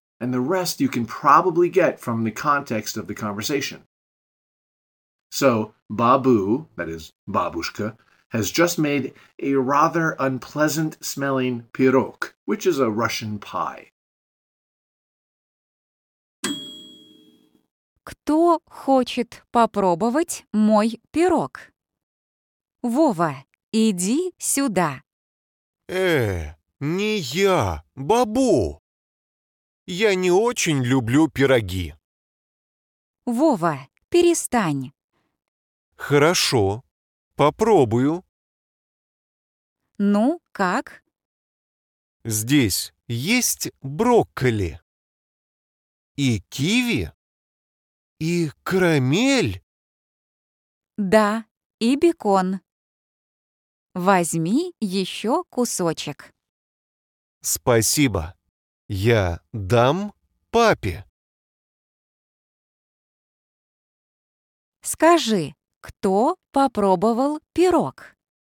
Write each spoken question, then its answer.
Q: Скажи, кто попробовал пирог?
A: Вова.